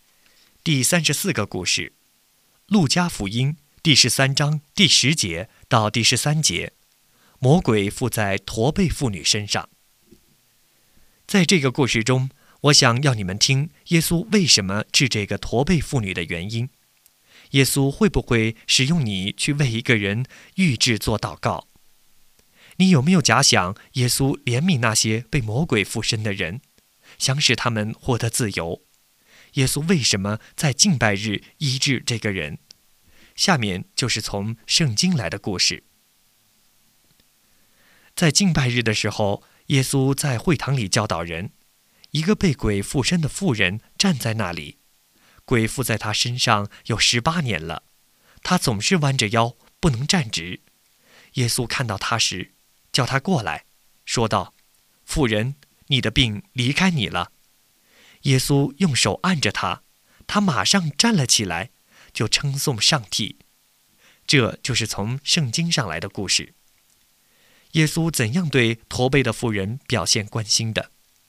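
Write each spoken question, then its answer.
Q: 耶稣怎样对驼背的妇人表现关心的?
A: 叫她过来,说她的病离开她了,并用手按着她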